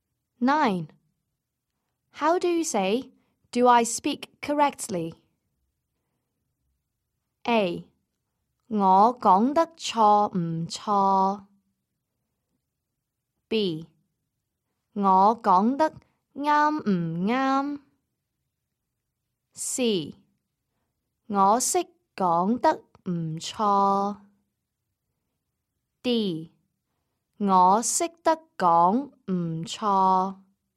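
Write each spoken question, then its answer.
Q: How do you say "Do I speak correctly"?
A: B: 我講得啱唔啱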